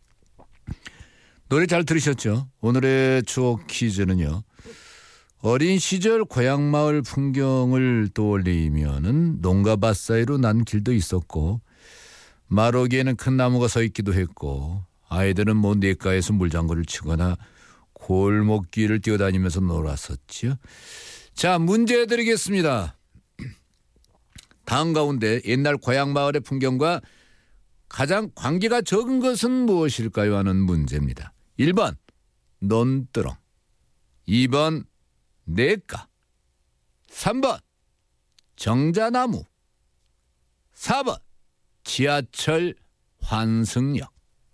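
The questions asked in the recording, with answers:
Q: 다음 가운데 옛날 고향 마을의 풍경과 가장 관계가 적은 것은 무엇일까요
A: 4: 지하철 환승역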